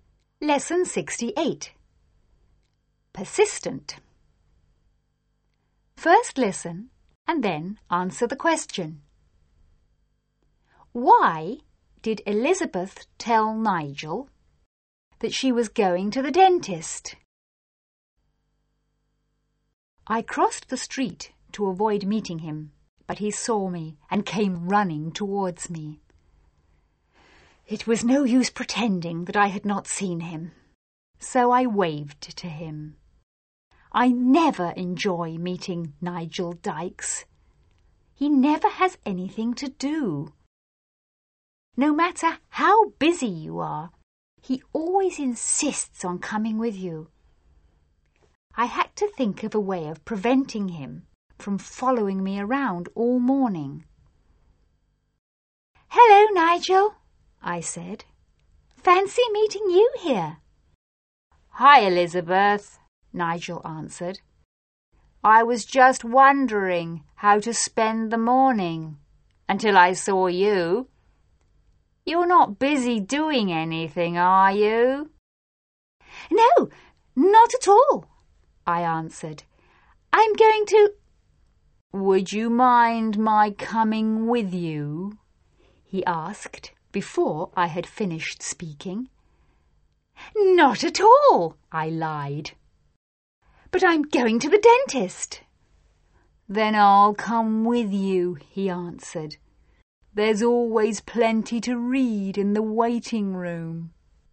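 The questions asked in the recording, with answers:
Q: Why did Elizabeth tell Nigel that she was going to the dentist?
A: To stop him from following her around all morning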